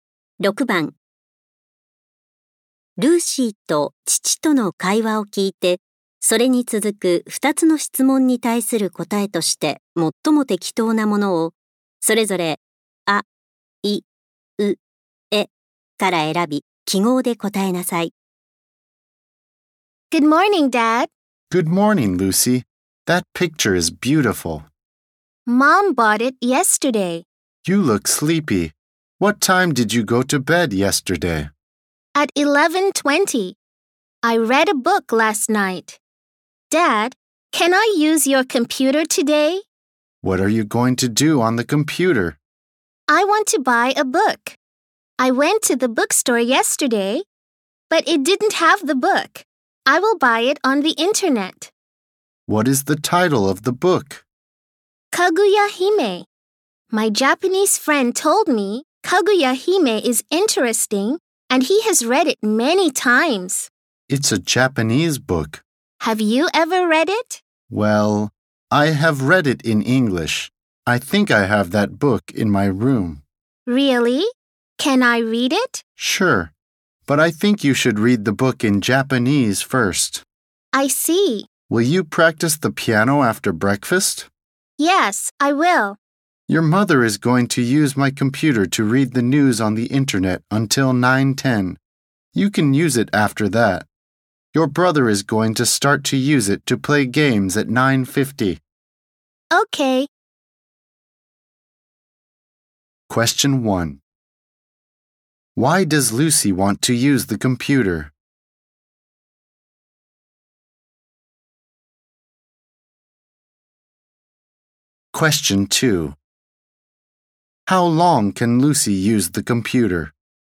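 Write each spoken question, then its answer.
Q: Why does Lucy want to use the computer?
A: To buy a book (Kaguya Hime) on the internet

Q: How long can Lucy use the computer?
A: For 40 minutes (from 9:10 to 9:50)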